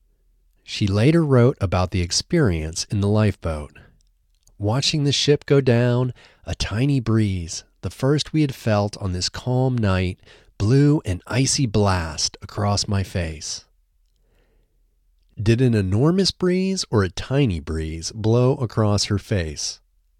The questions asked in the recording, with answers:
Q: Did an enormous breeze or a tiny breeze blow across her face?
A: A tiny breeze blew across her face.